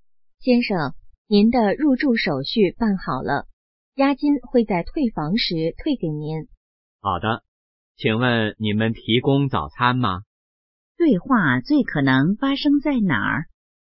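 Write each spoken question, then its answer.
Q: 对话最可能发生在哪儿?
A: 酒店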